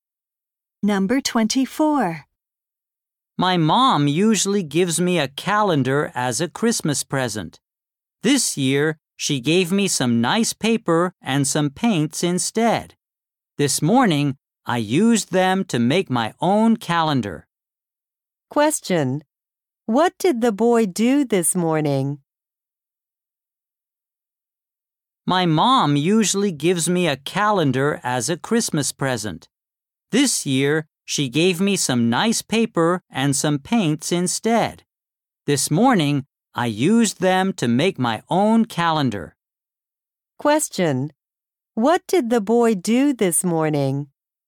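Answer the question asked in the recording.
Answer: He made his own calendar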